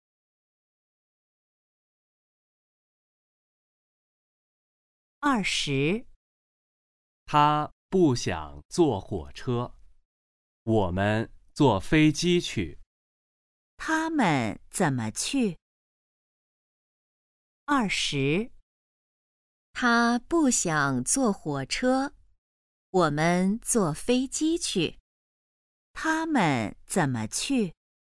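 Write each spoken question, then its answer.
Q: 他们怎么去?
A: 坐飞机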